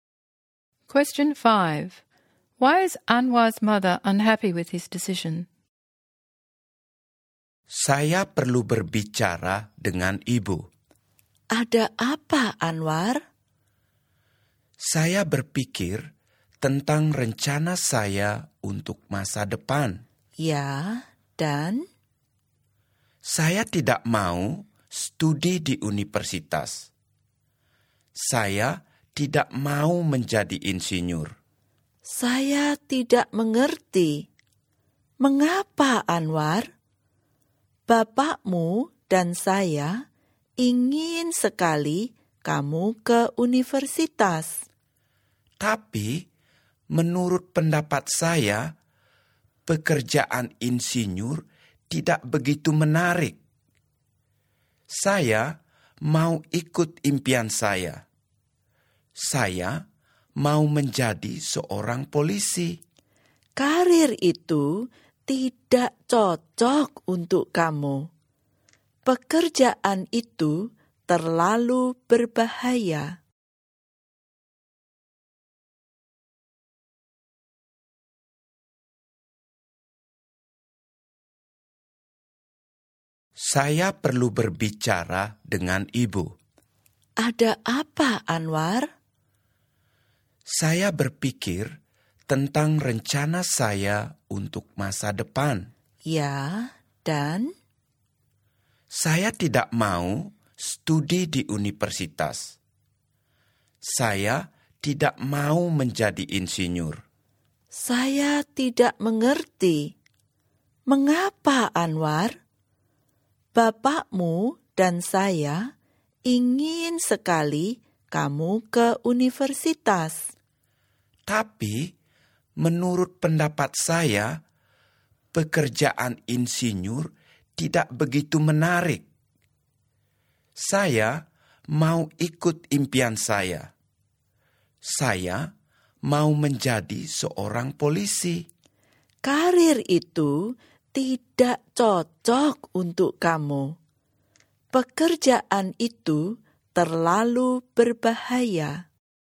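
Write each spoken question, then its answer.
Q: Why is Anwar's mother unhappy with his decision?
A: She wants him to go to university, and she thinks being a police officer is too dangerous and doesn't suit him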